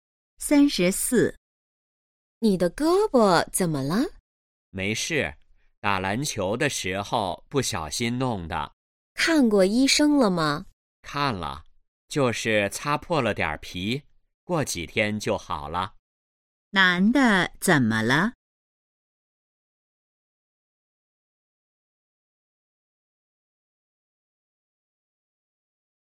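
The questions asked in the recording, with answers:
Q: 男的怎么了?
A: 打篮球时胳膊擦破了皮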